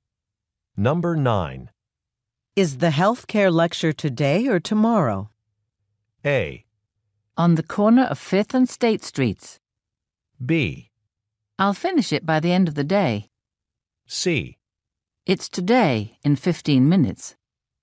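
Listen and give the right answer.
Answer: C: It's today, in 15 minutes.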